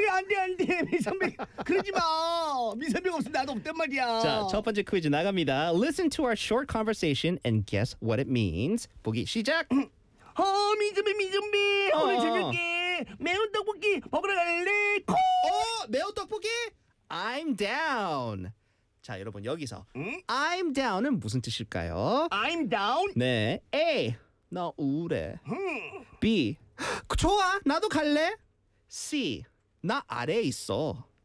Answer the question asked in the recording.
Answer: That's right. 맞습니다. I'm down.